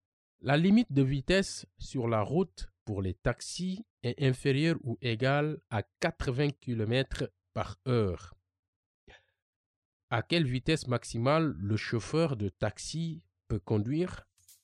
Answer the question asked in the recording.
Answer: Le maximum est 80 km par heure?